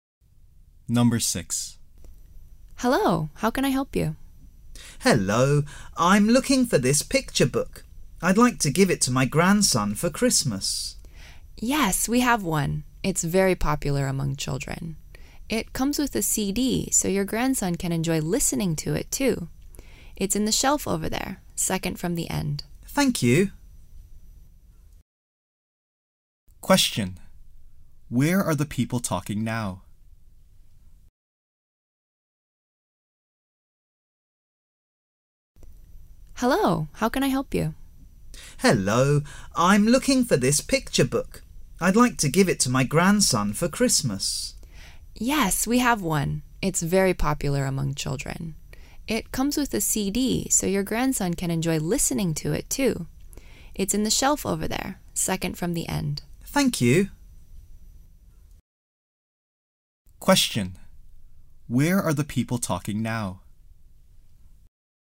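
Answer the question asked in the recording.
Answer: In a bookstore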